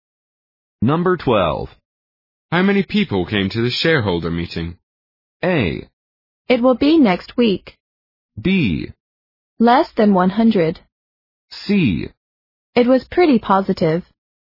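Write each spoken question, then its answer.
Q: How many people came to the shareholder meeting?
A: B: Less than 100.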